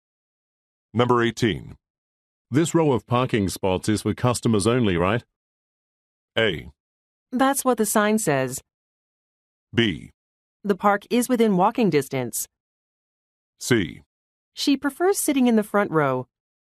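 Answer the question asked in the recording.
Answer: A: That's what the sign says.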